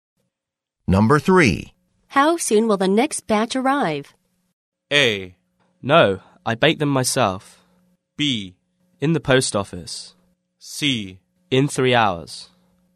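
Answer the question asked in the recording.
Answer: C: In 3 hours.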